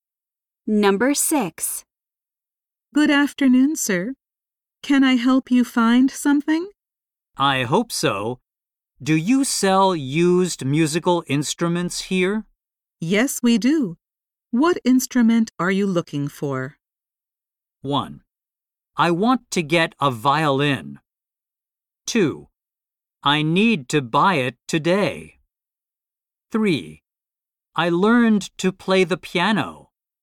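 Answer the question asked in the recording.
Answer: 1: I want to get a violin.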